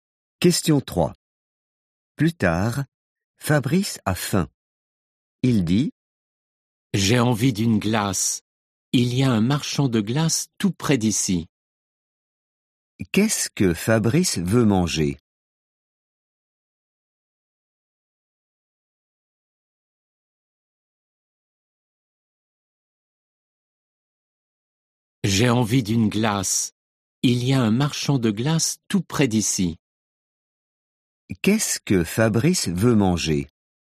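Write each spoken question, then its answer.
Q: Qu'est-ce que Fabrice veut manger?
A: une glace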